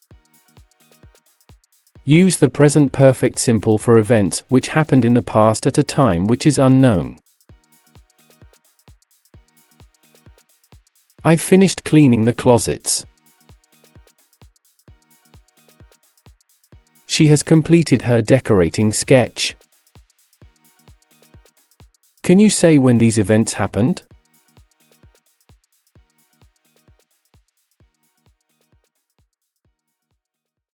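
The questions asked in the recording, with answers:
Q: Can you say when these events happened?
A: No, the time is unknown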